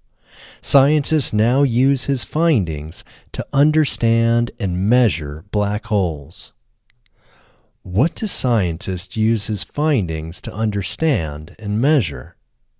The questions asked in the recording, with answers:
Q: What do scientists use his findings to understand and measure?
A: Scientists use his findings to understand and measure black holes.